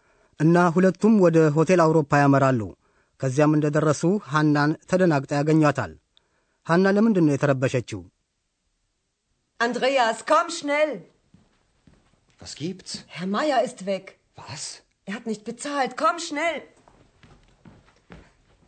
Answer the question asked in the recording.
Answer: ሃና የተጨነቀችው አቶ ማየር በመጥፋቱ ነው።